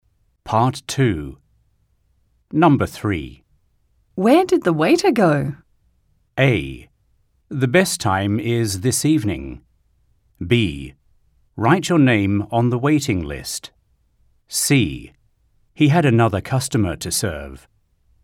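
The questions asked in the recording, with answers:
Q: Where did the waiter go?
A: C: He had another customer to serve.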